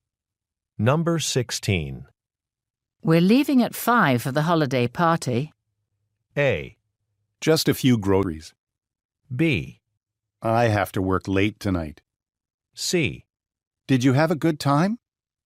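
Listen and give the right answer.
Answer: B: I have to work late tonight.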